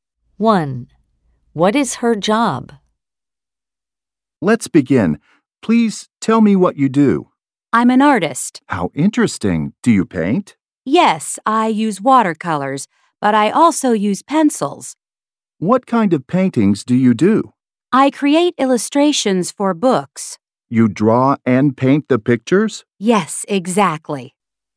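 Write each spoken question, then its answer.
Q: What is her job?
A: An artist who illustrates books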